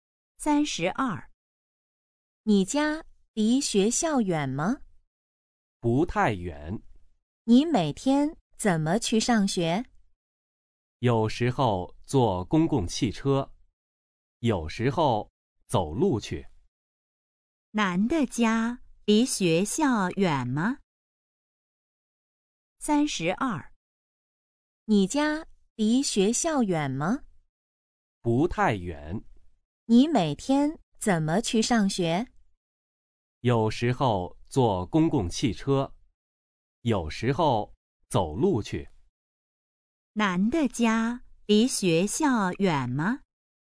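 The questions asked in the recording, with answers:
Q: 男的家离学校远吗?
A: 不太远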